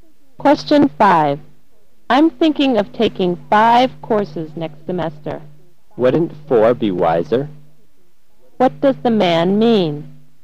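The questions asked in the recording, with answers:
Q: What does the man mean?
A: Taking four courses would be wiser than five.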